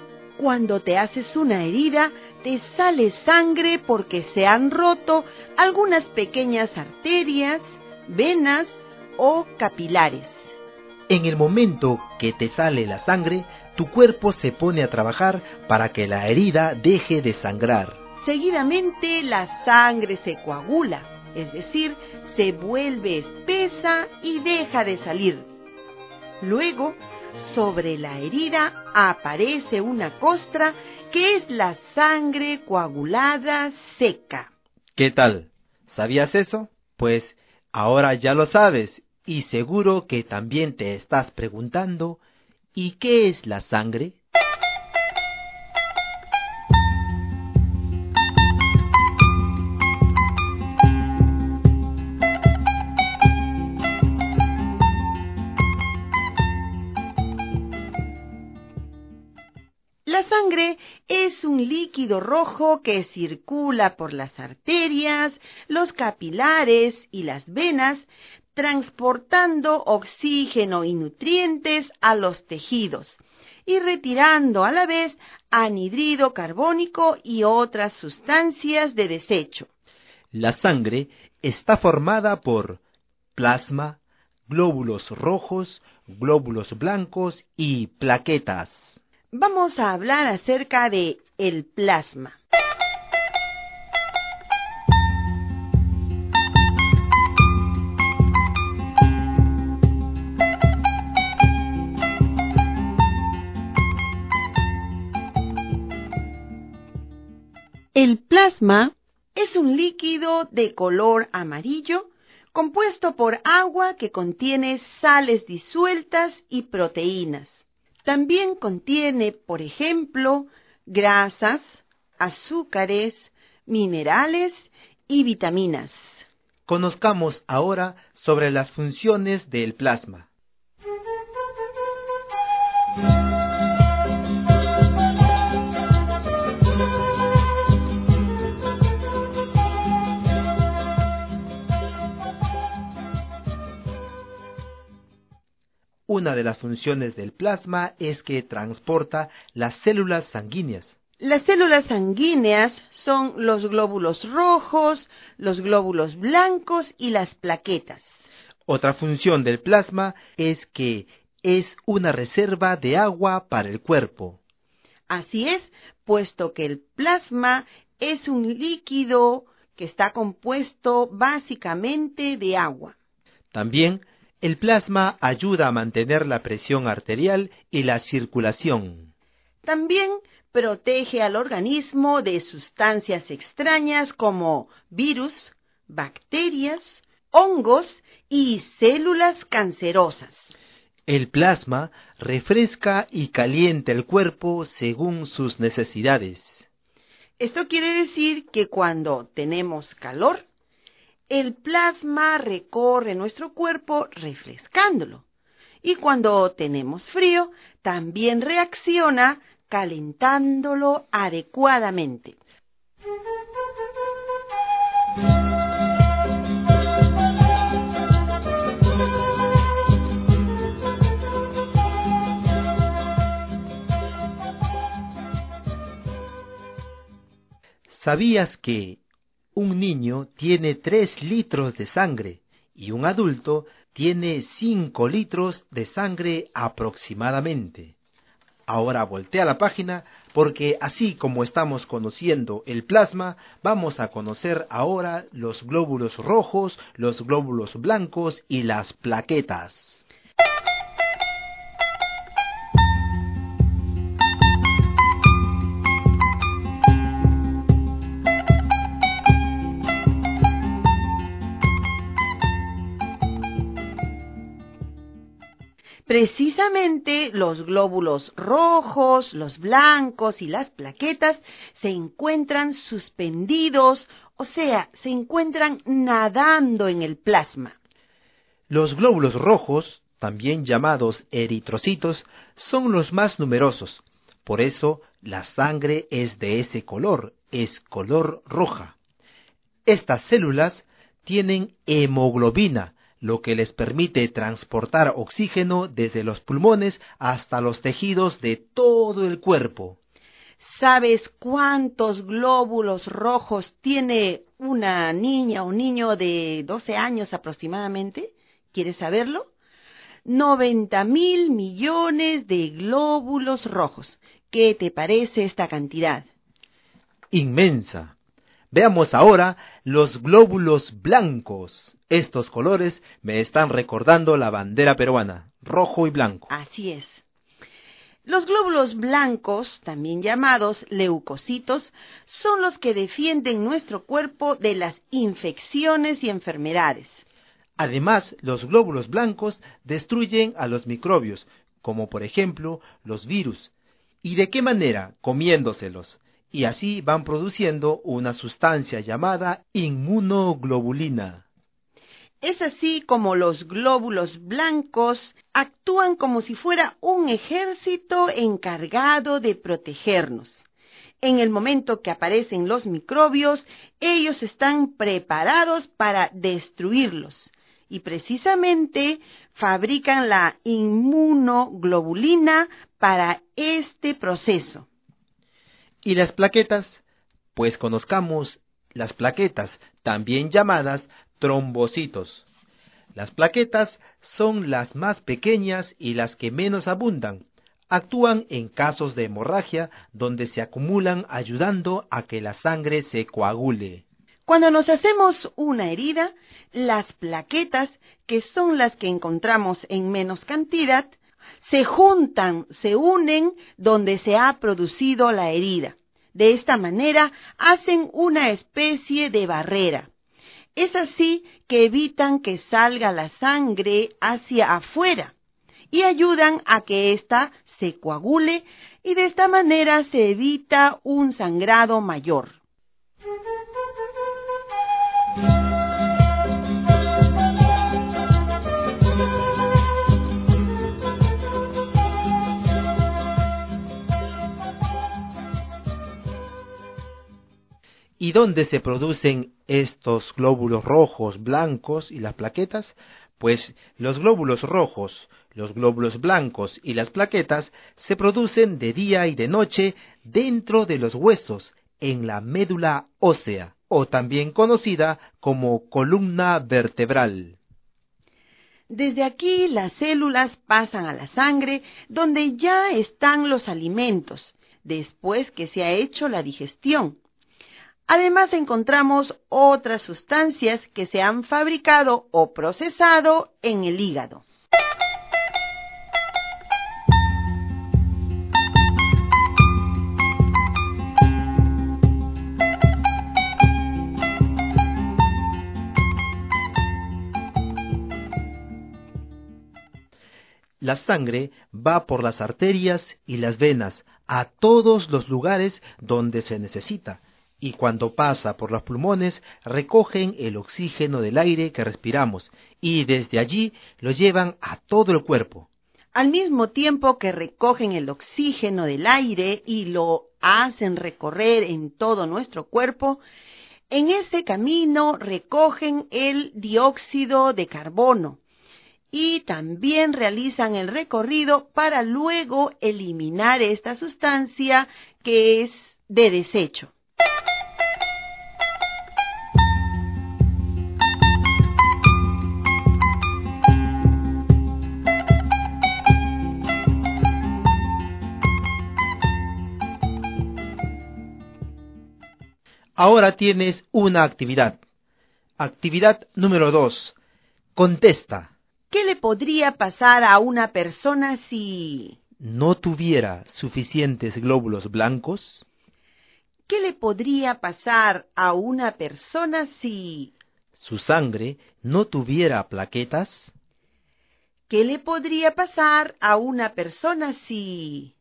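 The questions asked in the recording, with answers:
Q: ¿Qué le podría pasar a una persona si no tuviera suficientes glóbulos blancos?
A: No podría defenderse de infecciones y enfermedades; los microbios no serían destruidos

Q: ¿Qué le podría pasar a una persona si su sangre no tuviera plaquetas?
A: Su sangre no se coagularía y tendría hemorragias al herirse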